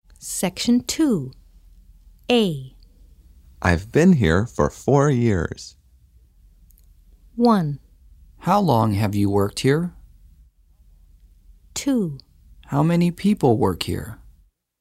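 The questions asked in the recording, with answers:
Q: I've been here for 4 years.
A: 1: How long have you worked here?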